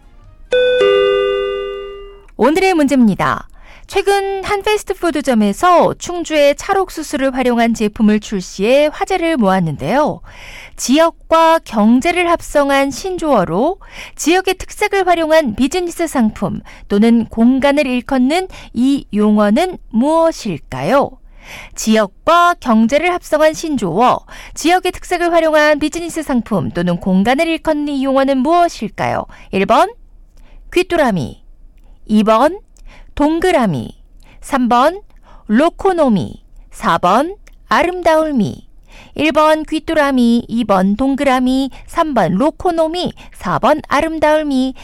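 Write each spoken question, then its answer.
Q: 지역과 경제를 합성한 신조어로 지역의 특색을 활용한 비즈니스 상품 또는 공간을 일컫는 이 용어는 무엇일까요?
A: 3: 로코노미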